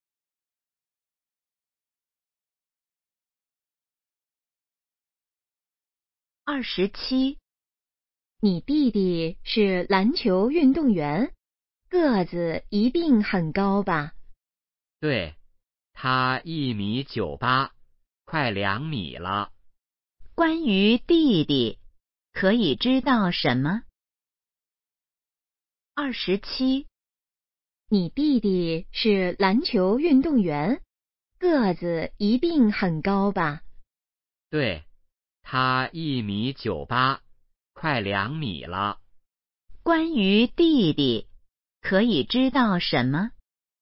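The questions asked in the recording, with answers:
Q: 关于弟弟,可以知道什么?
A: 个子很高,快2米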